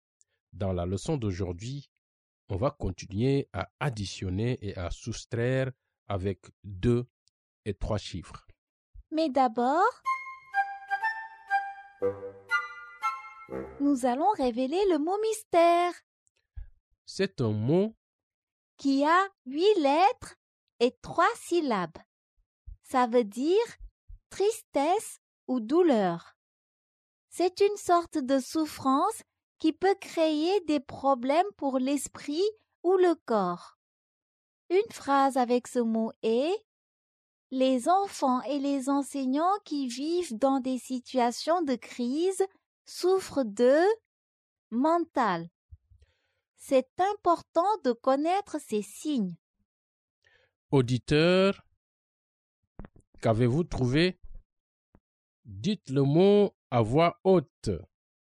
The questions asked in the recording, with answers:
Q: Auditeur, qu'avez-vous trouvé?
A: Le mot mystère est détresse.